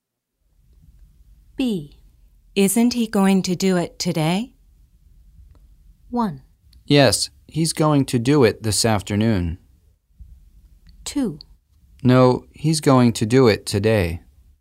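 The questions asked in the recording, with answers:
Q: Isn't he going to do it today?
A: 1: Yes, he's going to do it this afternoon.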